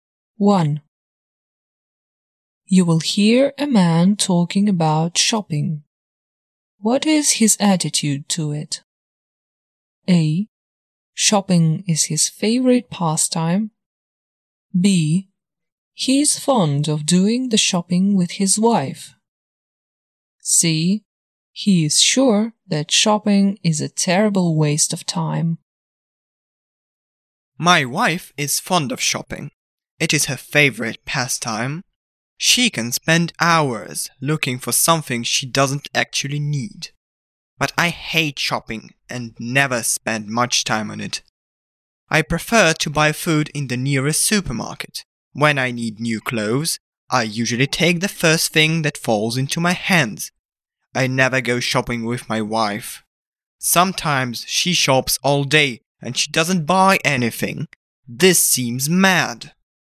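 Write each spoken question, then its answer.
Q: What is his attitude to it?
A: C: He is sure that shopping is a terrible waste of time.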